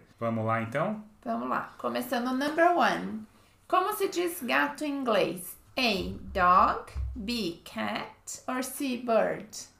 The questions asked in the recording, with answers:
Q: Como se diz gato em inglês?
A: Uh, B. Cat.